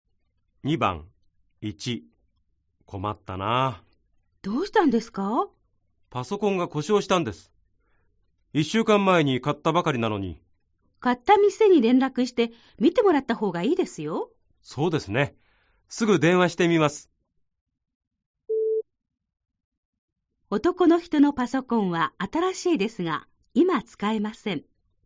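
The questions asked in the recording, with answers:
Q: 男の人のパソコンは新しいですが今使えません。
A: ○(正しい)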